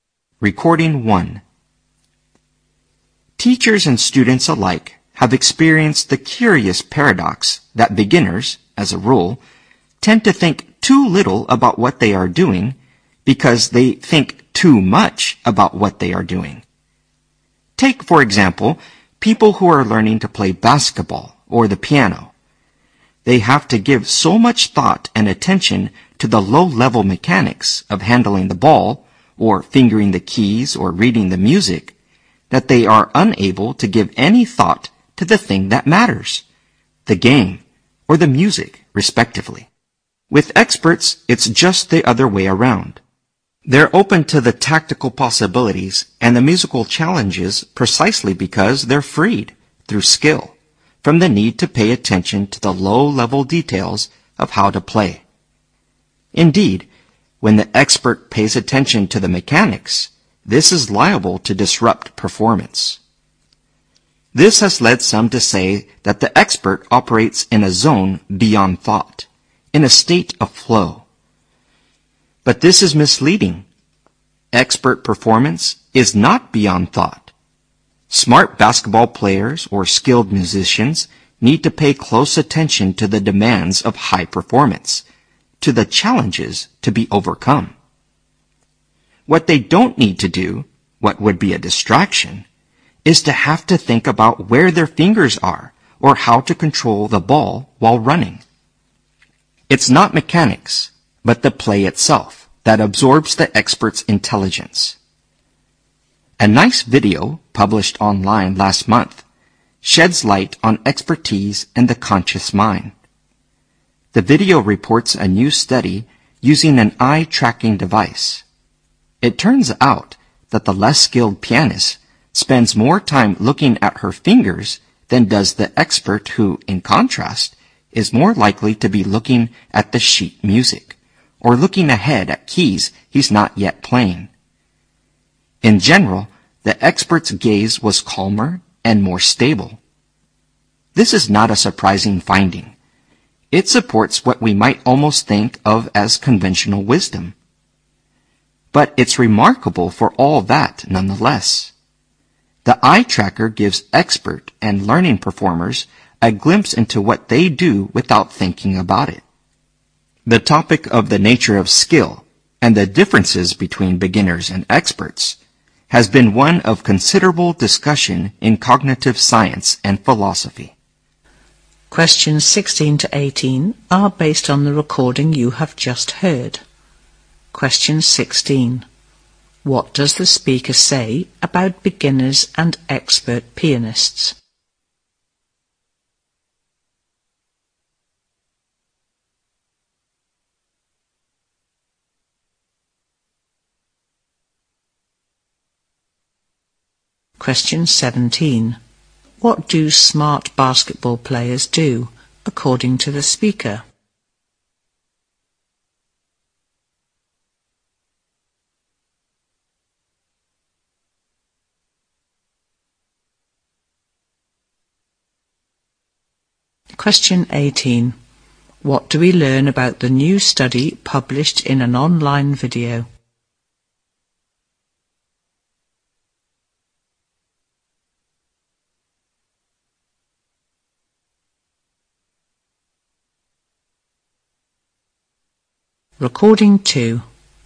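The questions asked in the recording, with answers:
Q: What do smart basketball players do, according to the speaker?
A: Pay close attention to the demands of high performance

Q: What do we learn about the new study published in an online video?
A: It used an eye-tracking device and found experts look less at their fingers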